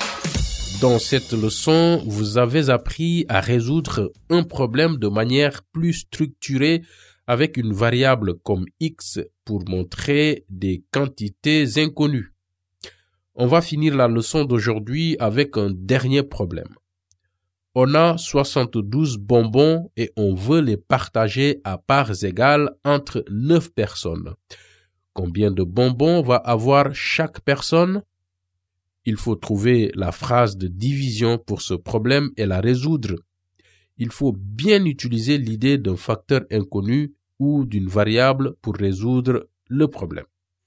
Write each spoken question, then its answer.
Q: Combien de bonbons va avoir chaque personne?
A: 72 divisé par 9 égale 8.